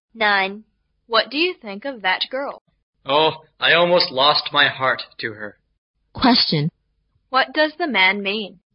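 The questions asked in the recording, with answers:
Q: What does the man mean?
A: He has almost fallen in love with her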